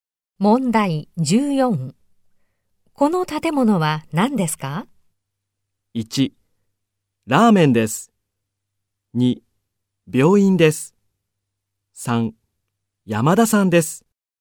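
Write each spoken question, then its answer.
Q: この建物は何ですか?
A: 3: 病院です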